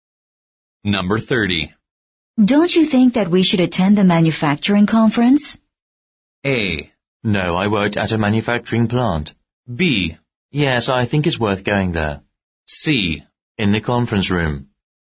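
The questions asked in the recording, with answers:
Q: Don't you think that we should attend the manufacturing conference?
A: B: Yes, I think it's worth going there.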